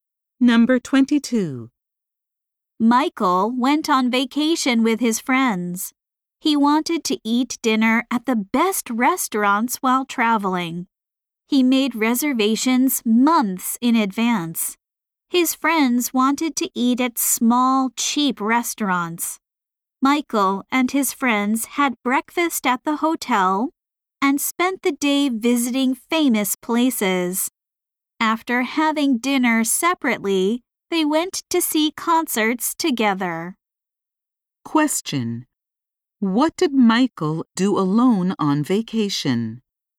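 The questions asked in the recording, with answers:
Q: What did Michael do alone on vacation?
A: He ate dinner at the best restaurants.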